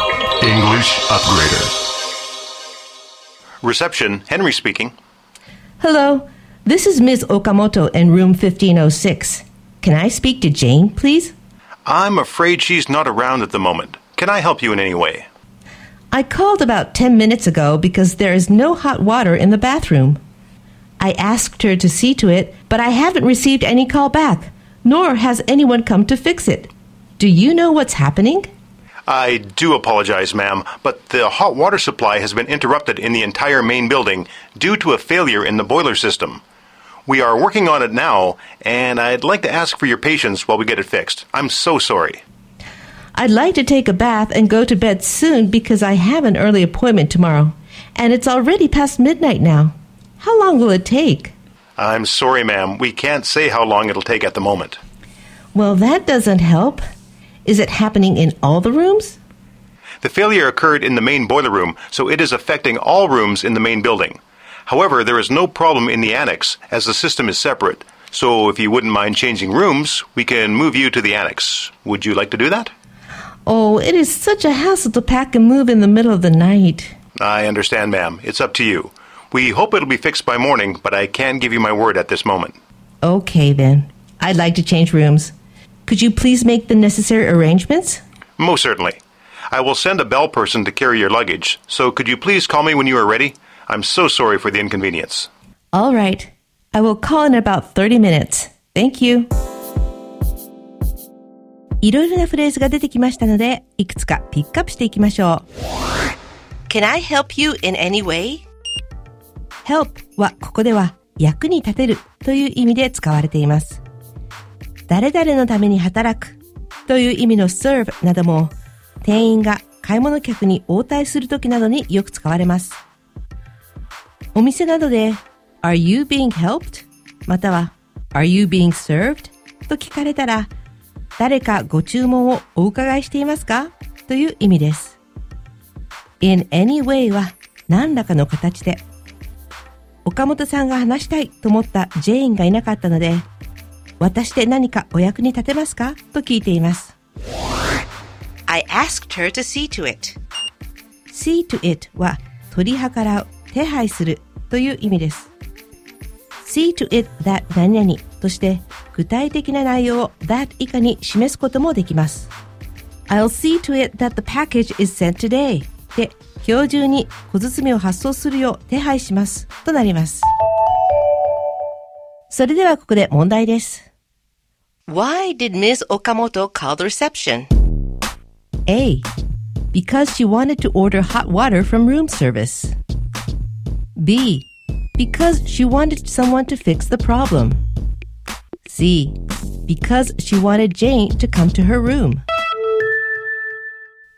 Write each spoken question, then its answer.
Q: Why did Ms. Okamoto call the reception?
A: ですので正解は B の誰かに故障を直してほしかったからです。